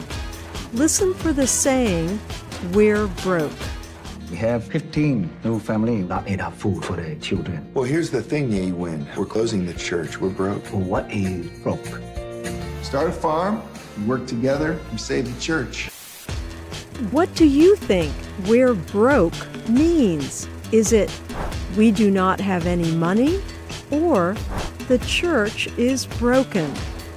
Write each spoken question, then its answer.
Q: What do you think we're broke means?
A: We're broke means we do not have any money.